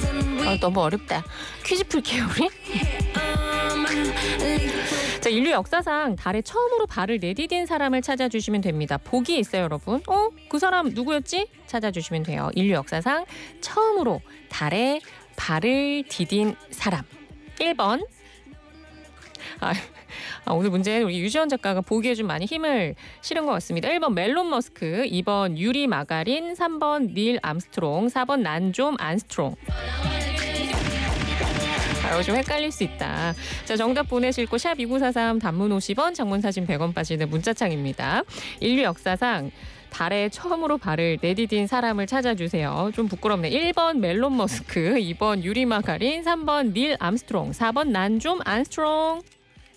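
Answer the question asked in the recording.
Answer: 3: 닐 암스트롱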